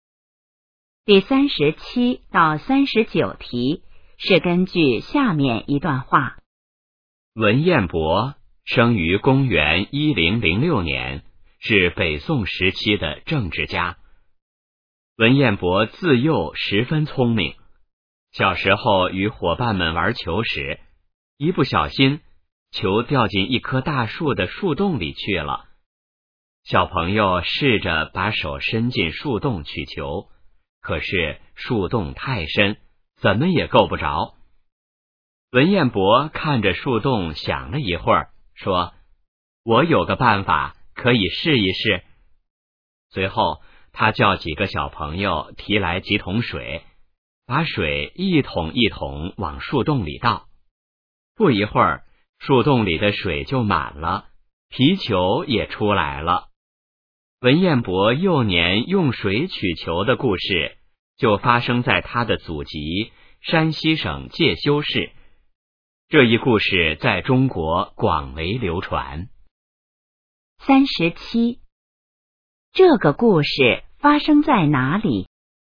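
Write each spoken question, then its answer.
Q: 这个故事发生在哪里?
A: 山西省介休市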